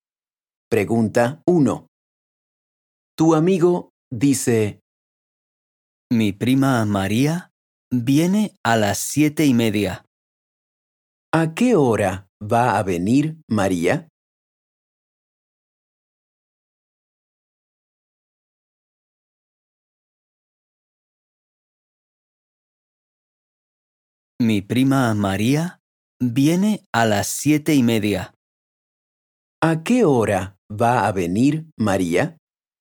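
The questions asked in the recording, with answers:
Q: ¿A qué hora va a venir María?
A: a las 7:30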